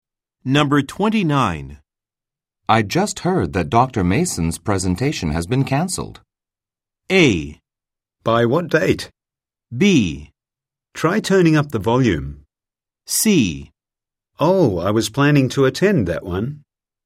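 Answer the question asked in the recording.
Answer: C: Oh, I was planning to attend that one.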